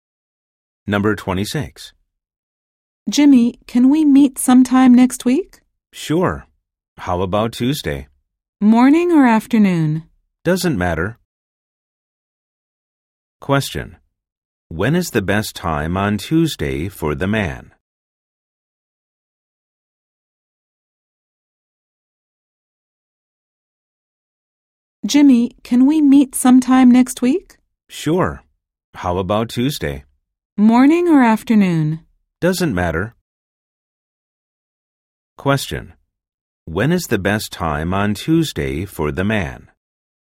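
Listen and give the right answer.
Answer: Either morning or afternoon; it doesn't matter.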